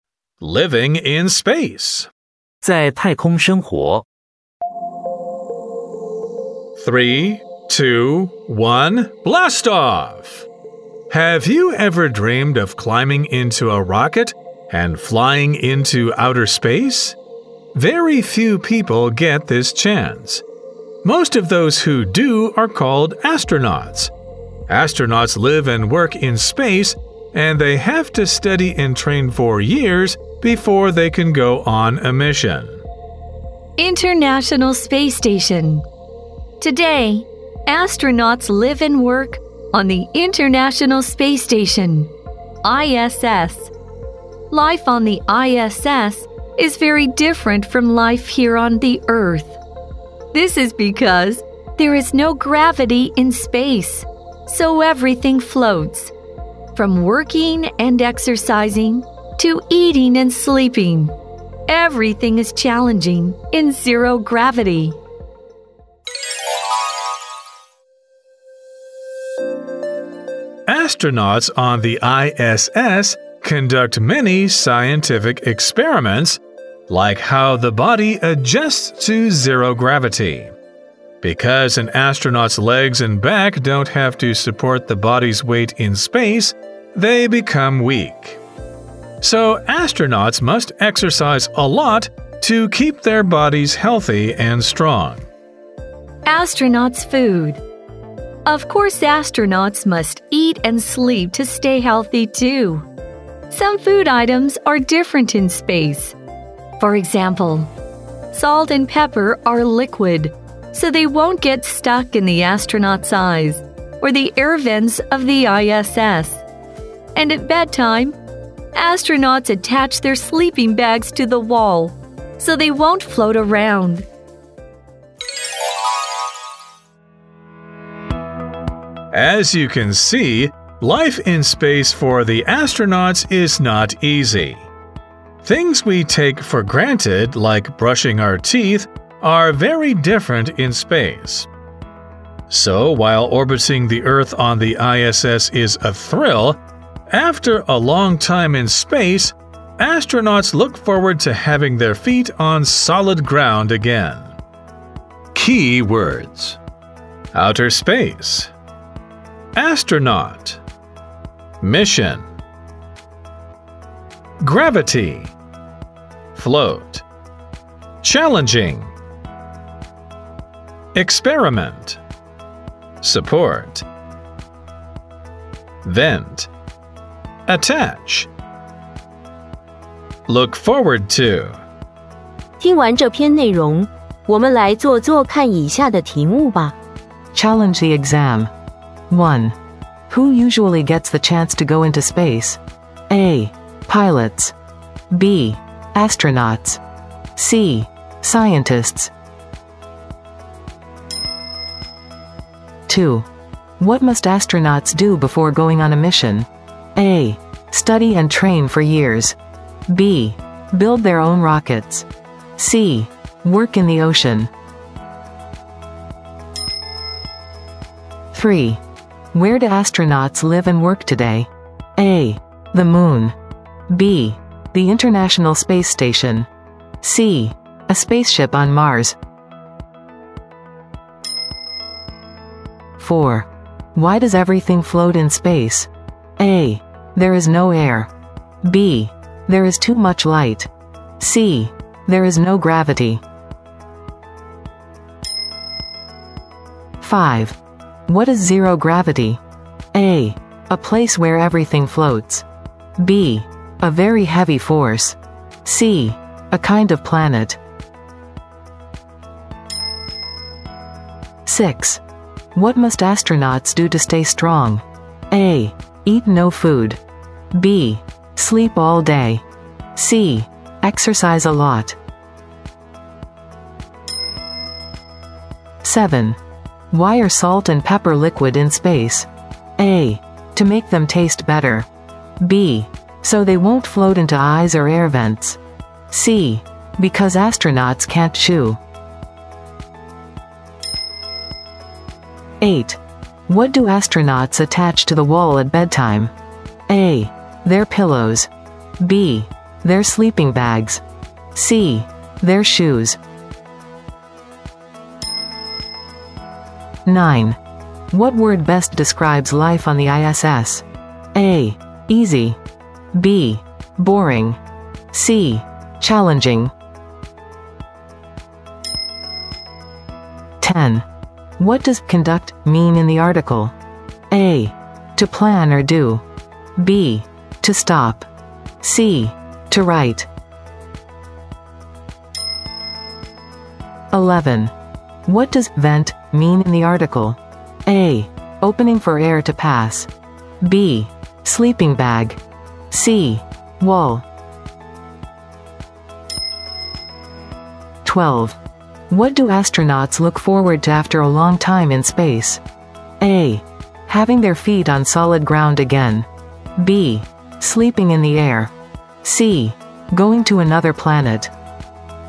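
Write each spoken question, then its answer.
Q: Who usually gets the chance to go into space?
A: B: Astronauts.

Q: What must astronauts do before going on a mission?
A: A: Study and train for years.

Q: Where do astronauts live and work today?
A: B: The International Space Station.

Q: Why does everything float in space?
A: C: There is no gravity.

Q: What is zero gravity?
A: A: A place where everything floats.

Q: What must astronauts do to stay strong?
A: C: Exercise a lot.

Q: Why are salt and pepper liquid in space?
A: B: So they won't float into eyes or air vents.

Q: What do astronauts attach to the wall at bedtime?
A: B: Their sleeping bags.

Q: What word best describes life on the ISS?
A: C: Challenging.

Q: What does conduct mean in the article?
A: A: To plan or do.

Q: What does vent mean in the article?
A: A: Opening for air to pass.

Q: What do astronauts look forward to after a long time in space?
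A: A: Having their feet on solid ground again.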